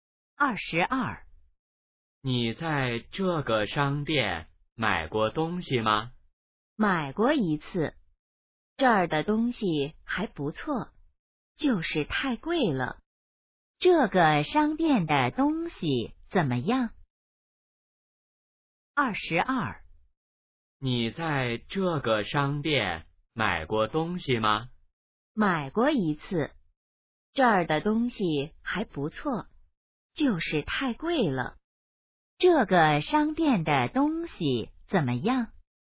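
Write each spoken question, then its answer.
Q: 这个商店的东西怎么样?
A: 不错,就是太贵了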